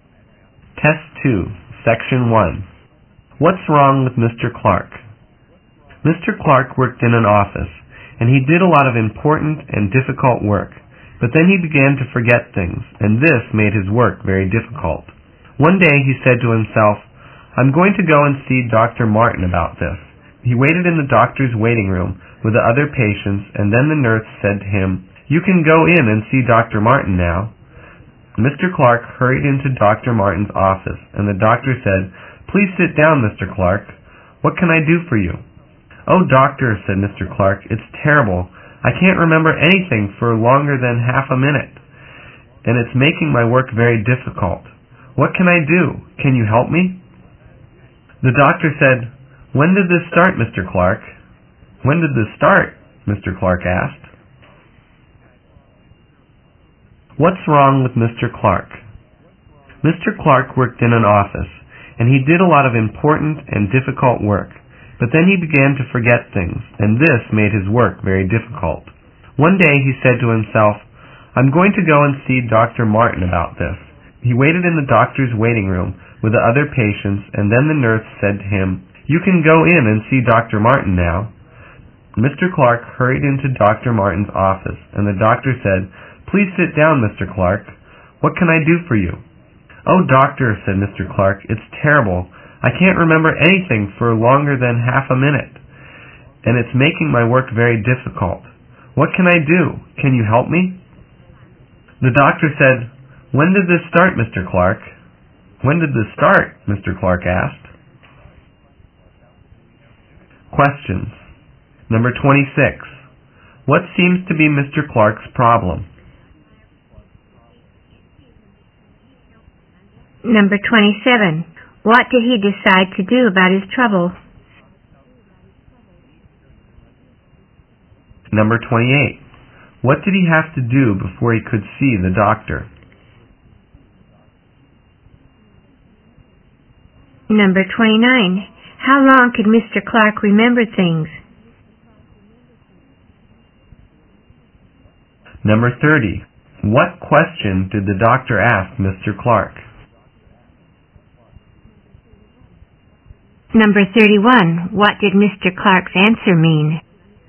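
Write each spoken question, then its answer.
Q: What seems to be Mr. Clark's problem?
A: He forgets things very quickly

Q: What did he decide to do about his trouble?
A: Go and see Dr. Martin

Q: What did he have to do before he could see the doctor?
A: Wait in the waiting room

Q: How long could Mr. Clark remember things?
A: No longer than half a minute

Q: What question did the doctor ask Mr. Clark?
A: When did this start?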